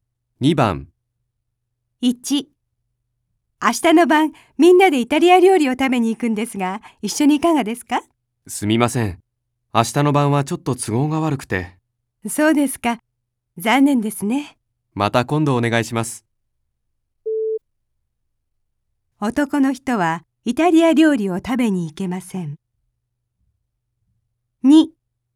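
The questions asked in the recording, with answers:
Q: 男の人はイタリア料理を食べに行けません。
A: ○(正しい)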